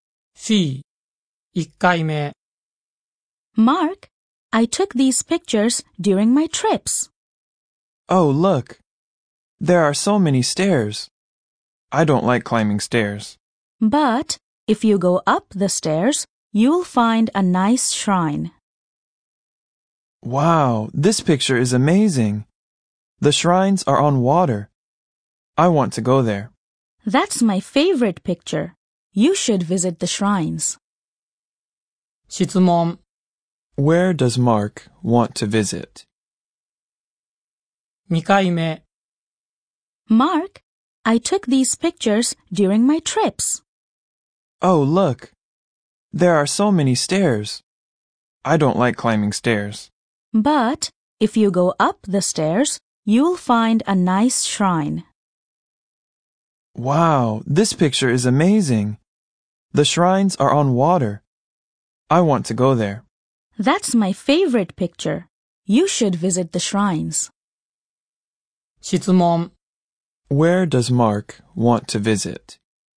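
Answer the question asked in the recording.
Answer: The shrines on the water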